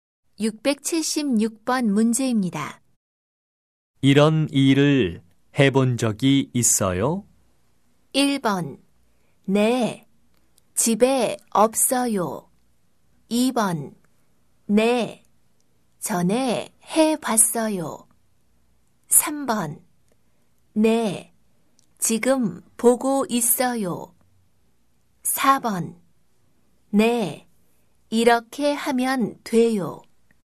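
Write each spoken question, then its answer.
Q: 이런 일을 해본 적이 있어요?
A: 2: 네, 전에 해봤어요.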